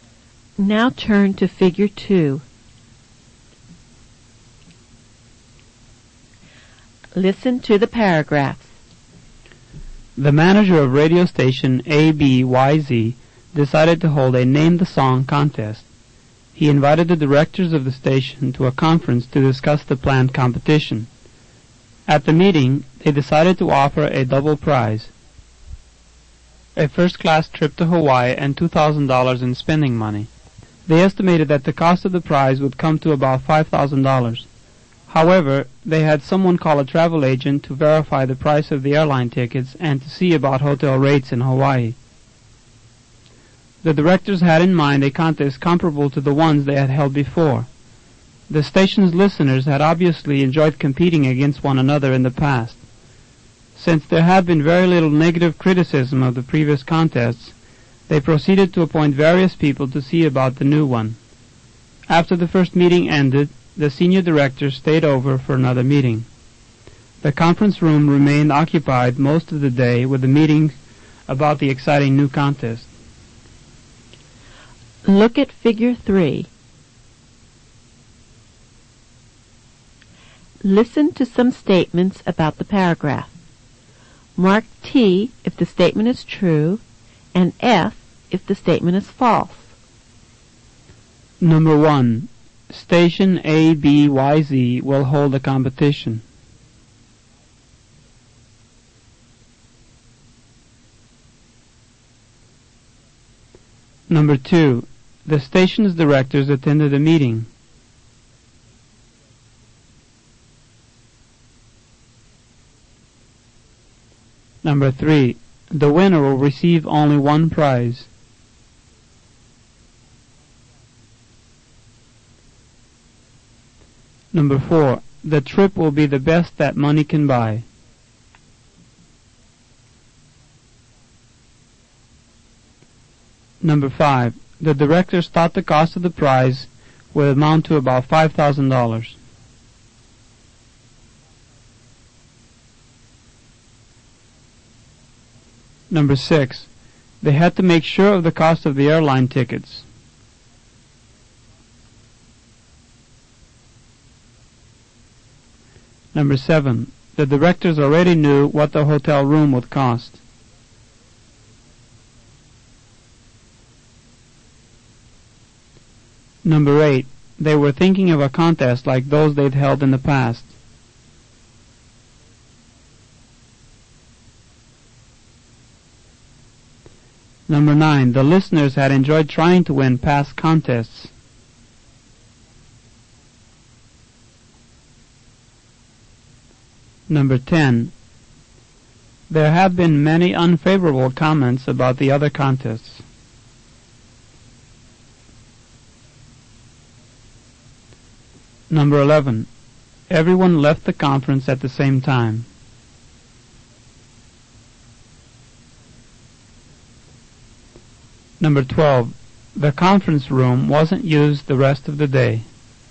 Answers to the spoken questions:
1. Number 1 is true.
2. Number 2 is true.
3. Number 3 is false.
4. Number 4 is true.
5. Number 5 is true.
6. Number 6 is true.
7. Number 7 is false.
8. Number 8 is true.
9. Number 9 is true.
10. Number 10 is false.
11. Number 11 is false.
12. Number 12 is false.